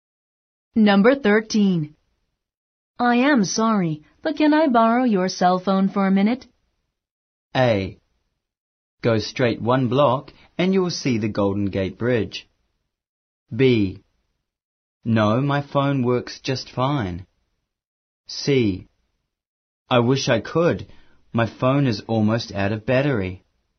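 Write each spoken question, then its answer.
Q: I am sorry, but can I borrow your cell phone for a minute?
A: C: I wish I could. My phone is almost out of battery.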